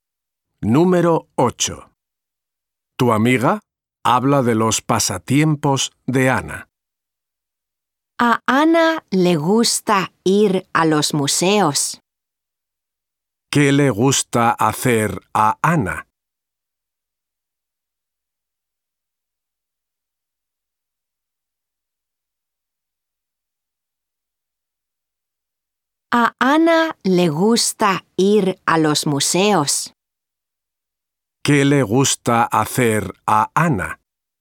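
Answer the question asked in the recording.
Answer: Ir a los museos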